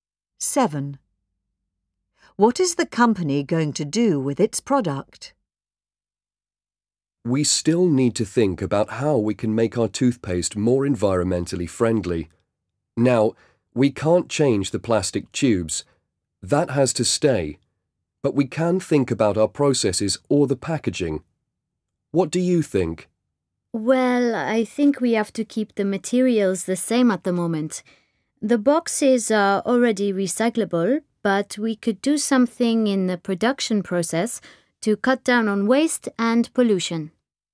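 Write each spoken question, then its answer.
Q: What is the company going to do with its product?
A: Change the production process to cut down on waste and pollution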